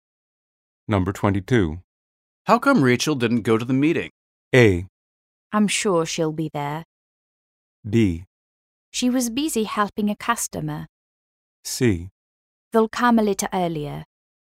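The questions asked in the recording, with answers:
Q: How come Rachel didn't go to the meeting?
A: B: She was busy helping a customer.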